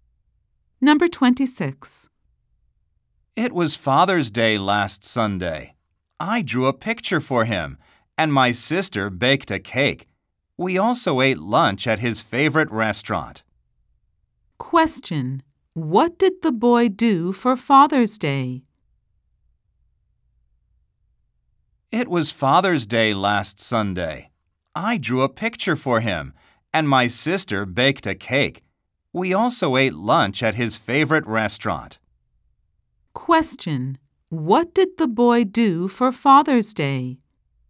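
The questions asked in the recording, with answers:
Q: What did the boy do for Father's Day?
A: He drew a picture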